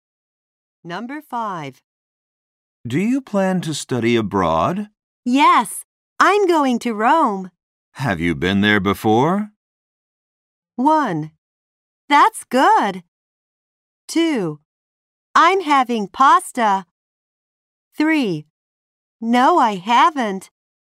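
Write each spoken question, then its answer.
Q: Have you been there before?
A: 3: No, I haven't.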